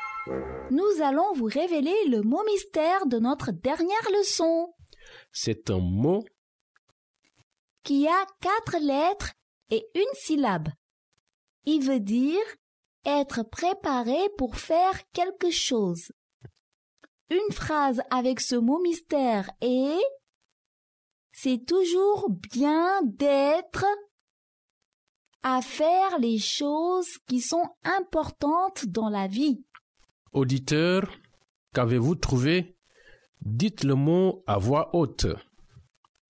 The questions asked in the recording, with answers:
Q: Auditeur, qu'avez-vous trouvé?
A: Le mot mystère d'aujourd'hui est « prêt ».